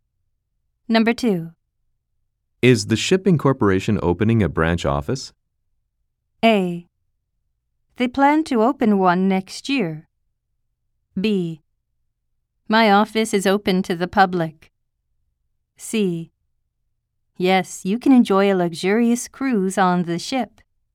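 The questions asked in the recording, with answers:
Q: Is the shipping corporation opening a branch office?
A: A: They plan to open one next year.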